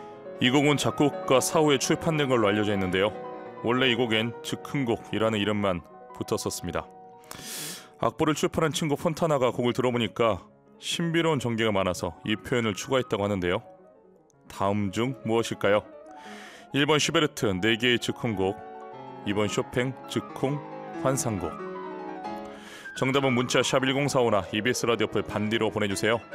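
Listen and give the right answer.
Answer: 2: 쇼팽 즉흥 환상곡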